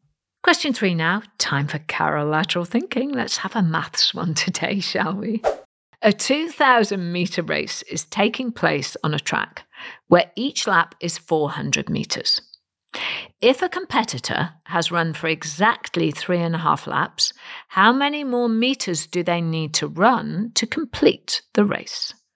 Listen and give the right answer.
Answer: And the answer is 600 metres.